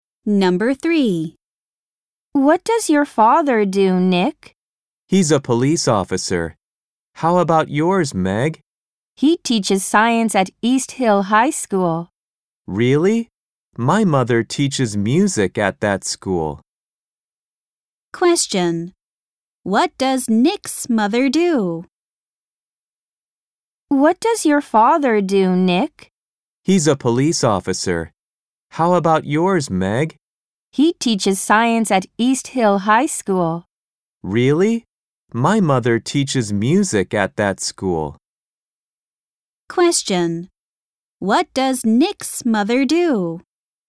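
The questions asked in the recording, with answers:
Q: What does Nick's mother do?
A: She teaches music at East Hill High School.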